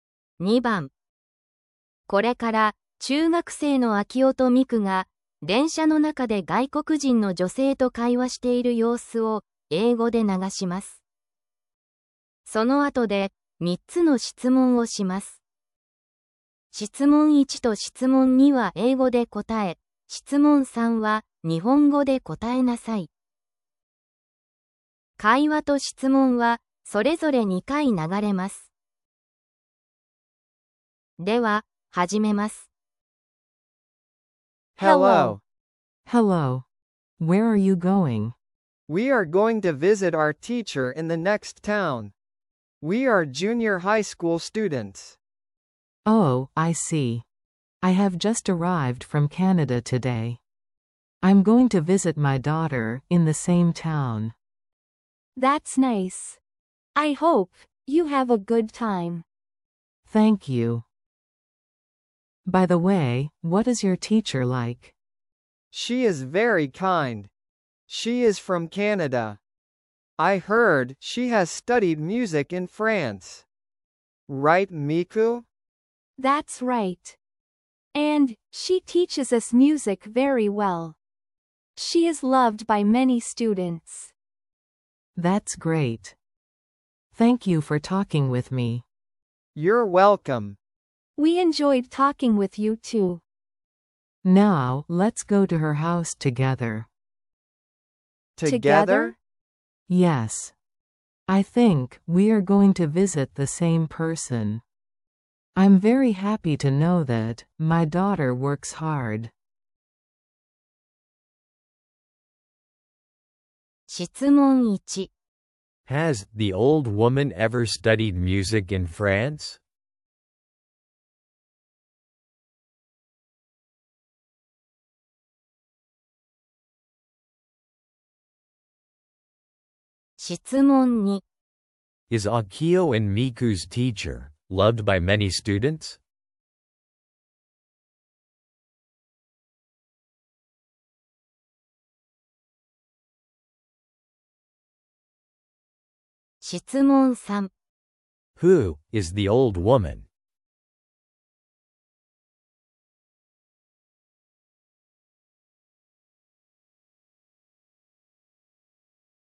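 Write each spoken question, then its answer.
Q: Is Akio and Miku's teacher loved by many students?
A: Yes, she is.

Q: Who is the old woman?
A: 秋音と美久の先生の母親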